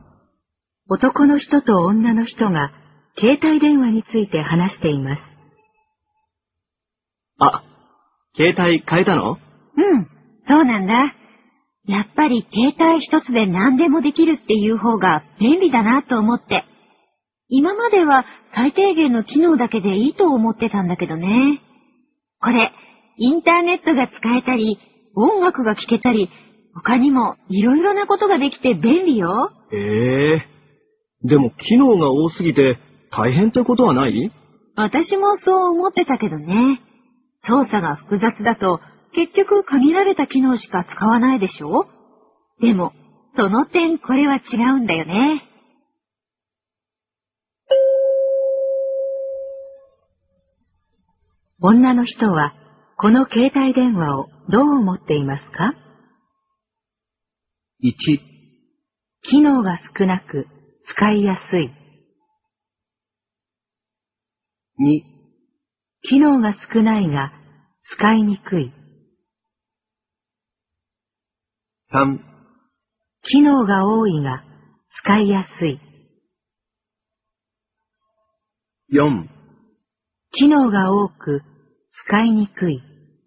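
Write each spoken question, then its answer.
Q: 女の人はこの携帯電話をどう思っていますか?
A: 3: 機能が多いが使いやすい。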